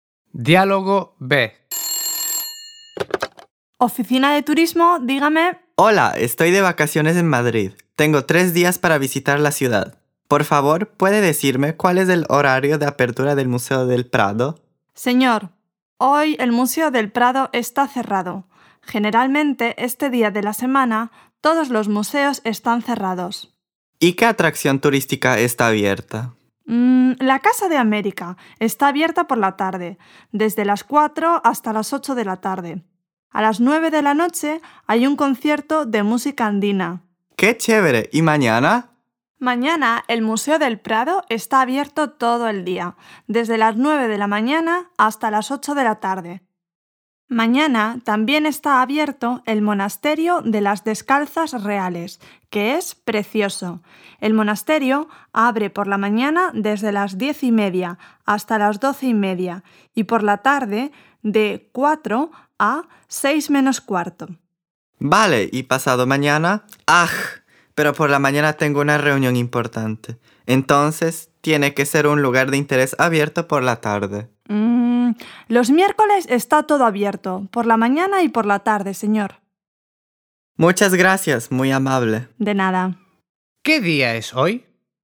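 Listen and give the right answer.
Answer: lunes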